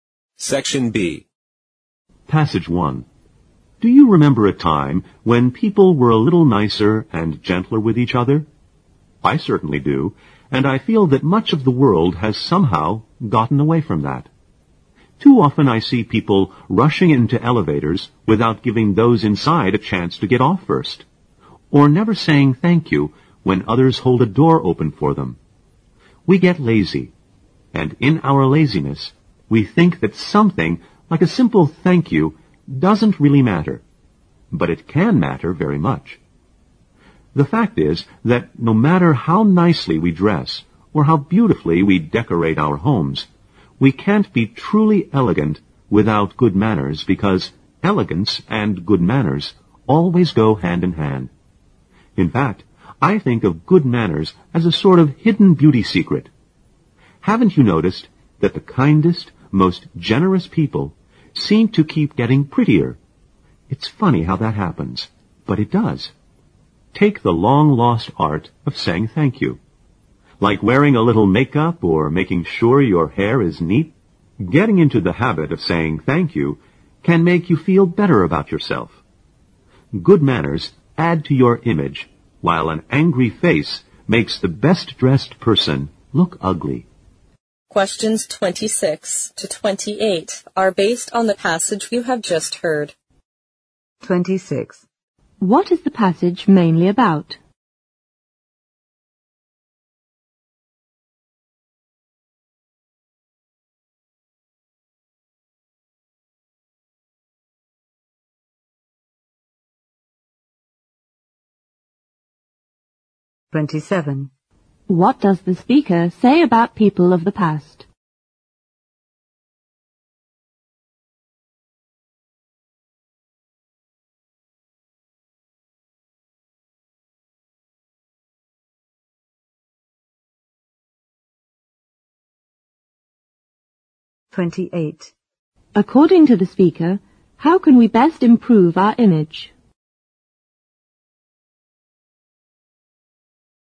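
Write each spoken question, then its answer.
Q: What is the passage mainly about?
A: The importance of good manners

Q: What does the speaker say about people of the past?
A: They were nicer and gentler with each other

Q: According to the speaker, how can we best improve our image?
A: By having good manners, such as saying thank you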